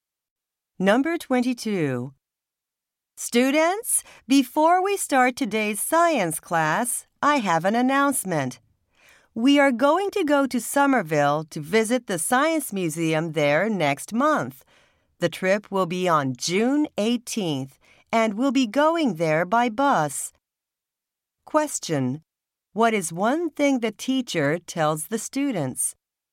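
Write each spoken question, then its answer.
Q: What is one thing the teacher tells the students?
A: The class will visit the Science Museum in Somerville by bus on June 18th.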